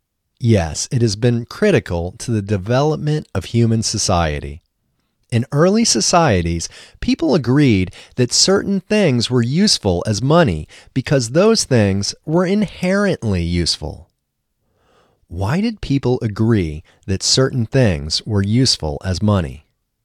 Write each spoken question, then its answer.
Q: Why did people agree that certain things were useful as money?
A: People agreed that certain things were useful as money because those things were inherently useful.